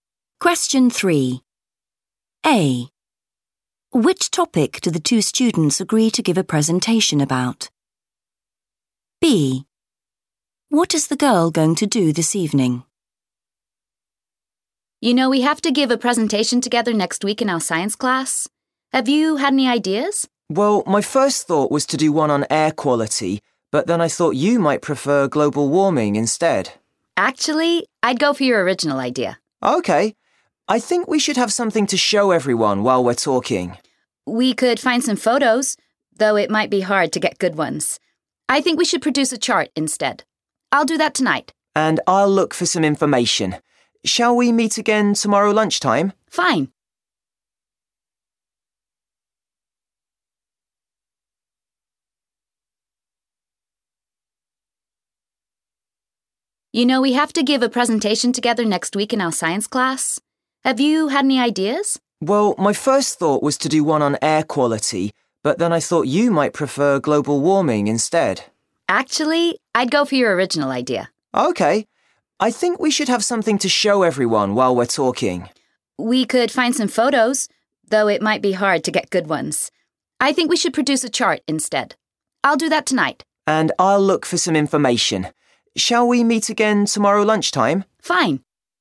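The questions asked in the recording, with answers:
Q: Which topic do the two students agree to give a presentation about?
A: air quality

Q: What is the girl going to do this evening?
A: produce a chart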